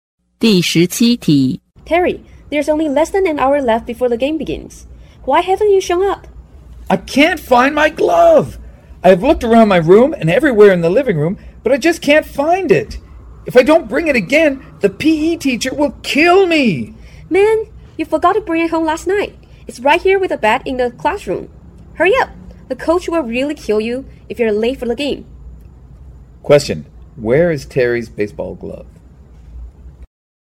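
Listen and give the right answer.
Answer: In the classroom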